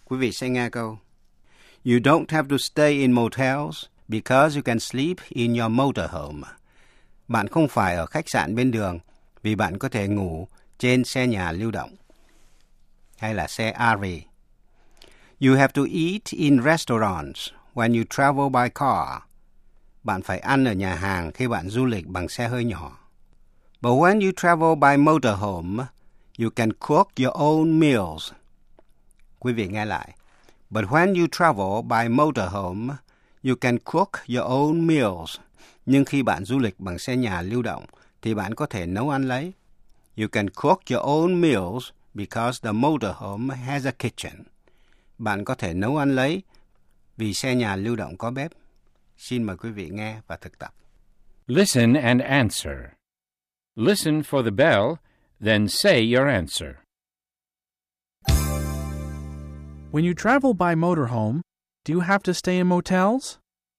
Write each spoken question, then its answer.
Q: When you travel by motorhome, do you have to stay in motels?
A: No, you don't. You don't have to stay in motels because you can sleep in your motorhome.